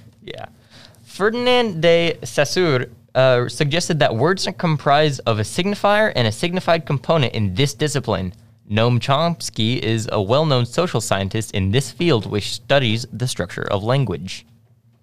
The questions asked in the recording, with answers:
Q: Noam Chomsky is a well-known social scientist in this field which studies the structure of language.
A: Linguistics is correct.